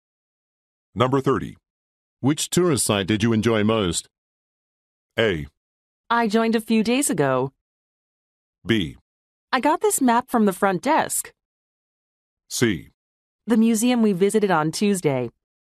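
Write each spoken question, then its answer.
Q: Which tourist site did you enjoy most?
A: C: The museum we visited on Tuesday.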